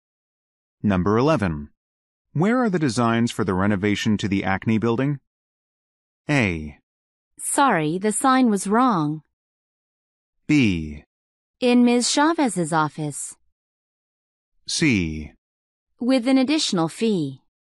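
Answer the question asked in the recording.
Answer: B: In Ms. Chavez's office.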